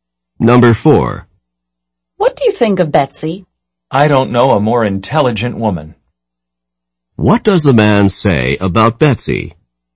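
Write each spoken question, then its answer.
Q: What does the man say about Betsy?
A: She is the most intelligent woman he knows.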